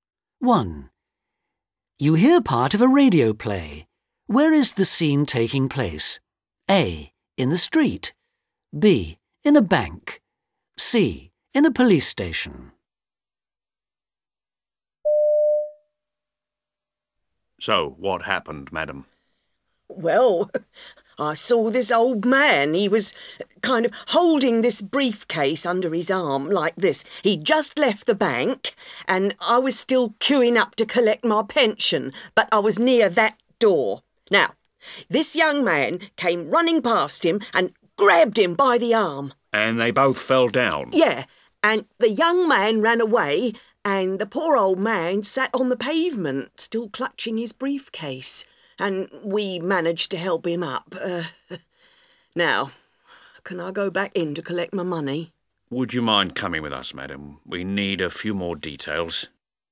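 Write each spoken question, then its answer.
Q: Where is the scene taking place?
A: A: In the street.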